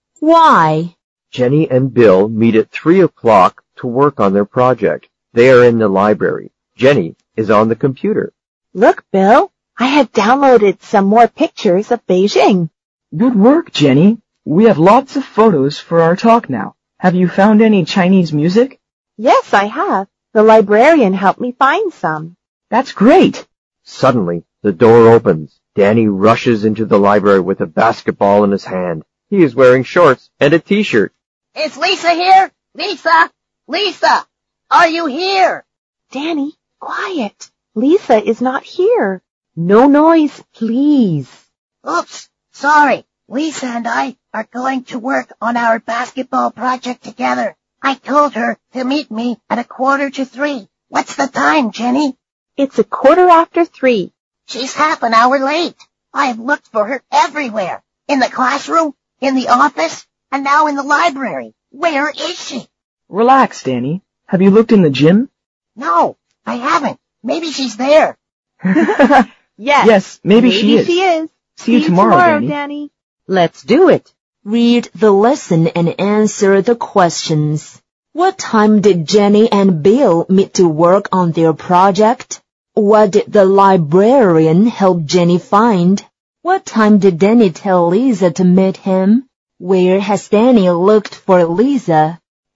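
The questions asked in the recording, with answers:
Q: What time did Jenny and Bill meet to work on their project?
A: At 3 o'clock

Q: What did the librarian help Jenny find?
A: Some Chinese music

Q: What time did Danny tell Lisa to meet him?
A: At 2:45

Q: Where has Danny looked for Lisa?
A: In the classroom, in the office and in the library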